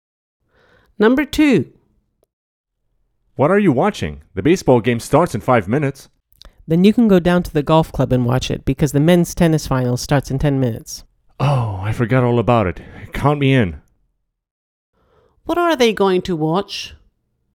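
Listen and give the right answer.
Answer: the men's tennis final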